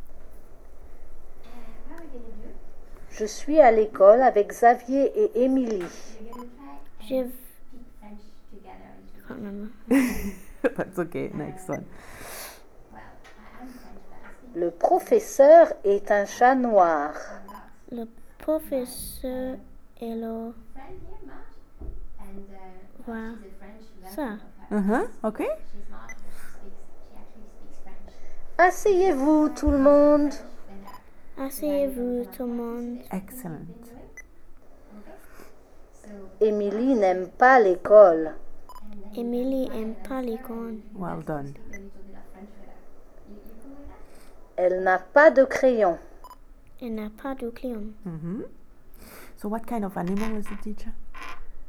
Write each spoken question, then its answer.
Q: So what kind of animal is the teacher?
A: Cat.